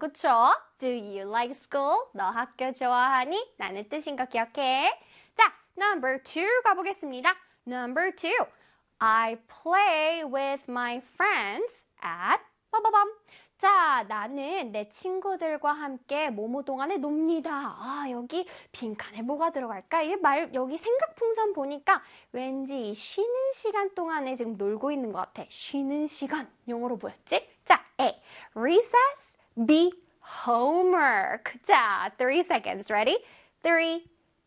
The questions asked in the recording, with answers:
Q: 쉬는 시간 영어로 뭐였지?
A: 쉬는 시간, break time이랑 같은 뜻을 갖고 있는 바로 단어는 recess이었습니다.